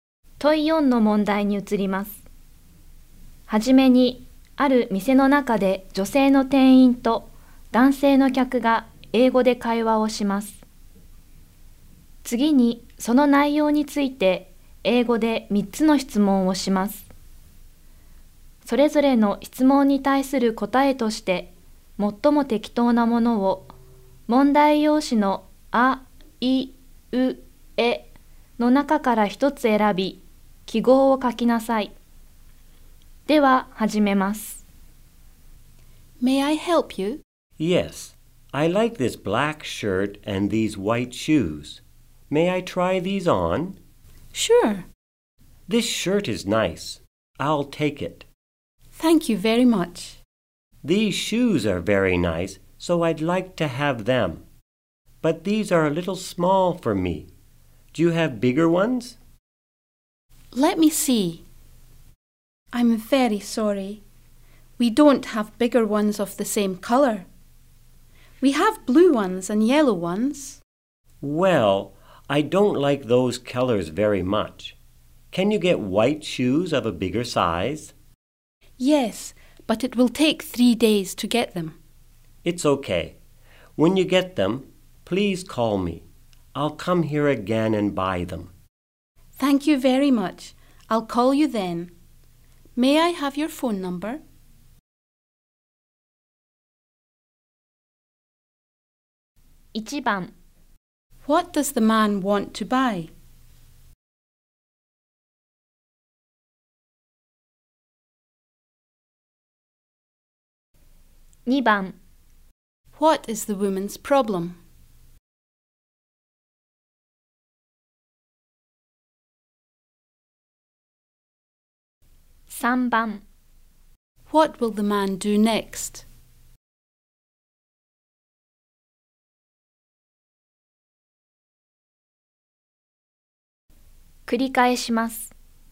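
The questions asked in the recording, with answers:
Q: What does the man want to buy?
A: A black shirt and white shoes

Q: What is the woman's problem?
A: The store doesn't have the white shoes in a bigger size.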